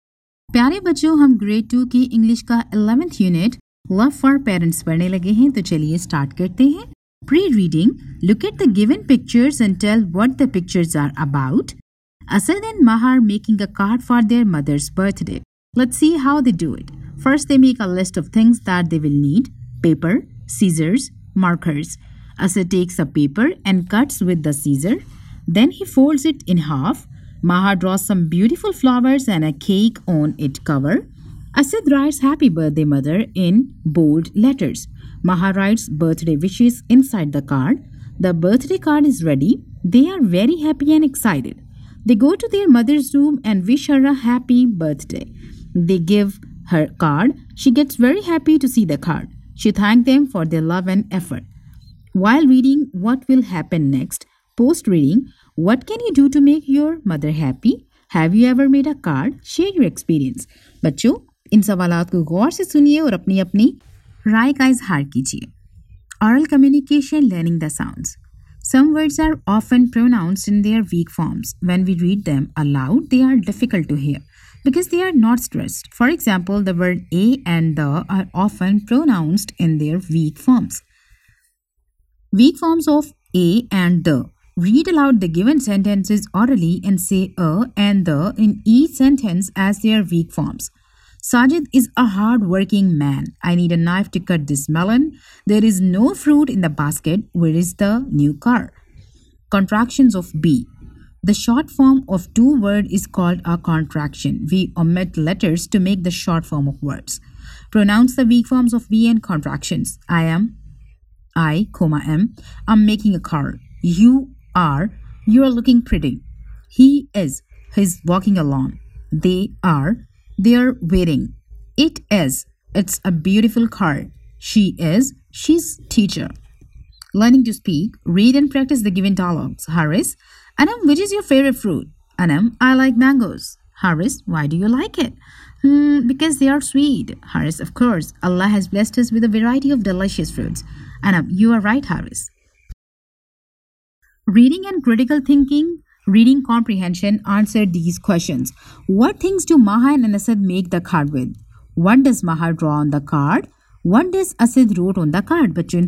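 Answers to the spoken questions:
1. Paper, scissors and markers
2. Beautiful flowers and a cake
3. Happy birthday mother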